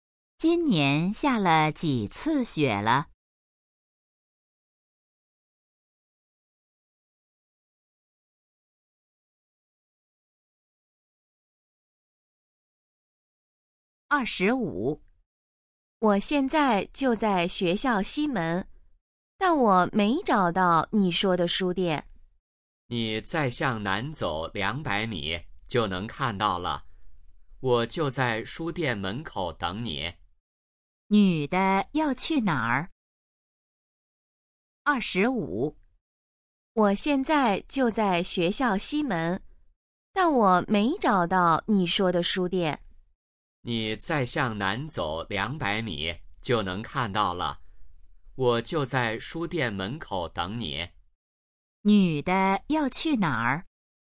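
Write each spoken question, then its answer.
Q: 女的要去哪儿?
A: 书店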